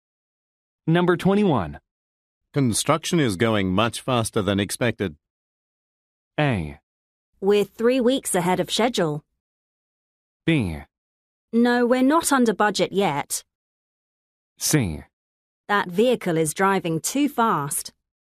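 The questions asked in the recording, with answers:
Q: Construction is going much faster than expected.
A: A: We're 3 weeks ahead of schedule.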